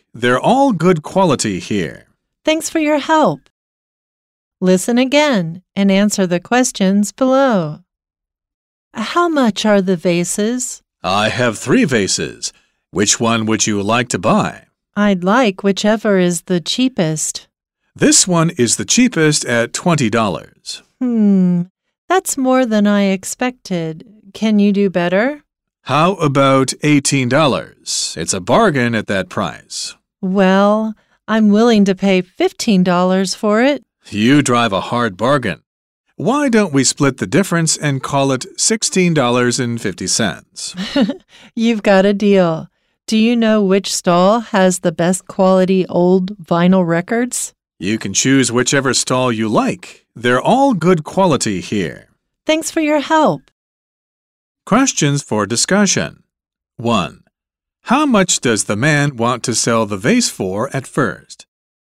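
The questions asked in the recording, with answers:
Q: How much does the man want to sell the vase for at first?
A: $20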